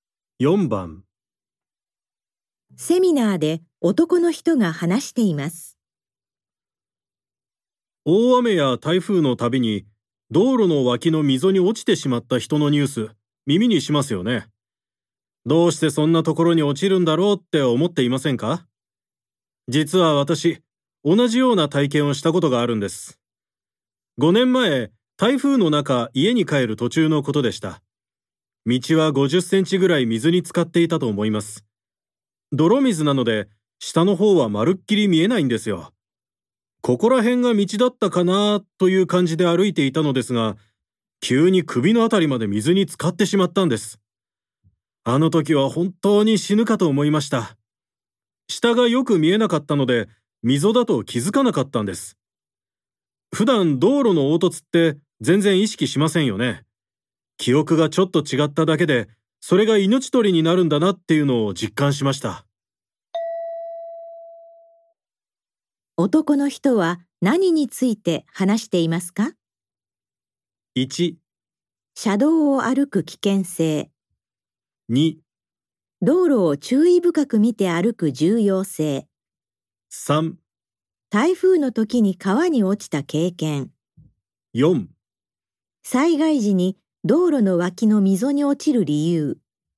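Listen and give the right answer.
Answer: 4: 災害時に道路の脇の溝に落ちる理由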